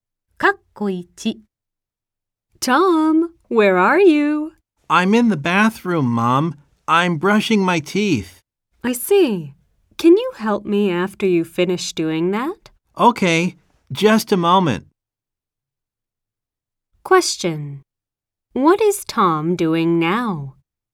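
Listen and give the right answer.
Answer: He is brushing his teeth.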